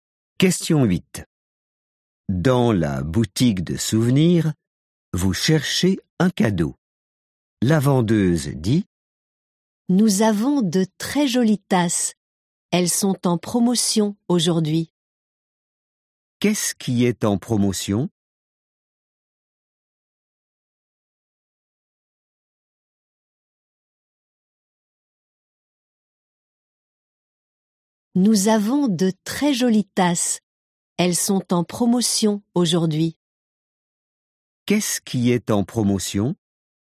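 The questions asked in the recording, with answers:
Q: Qu'est-ce qui est en promotion?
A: Les tasses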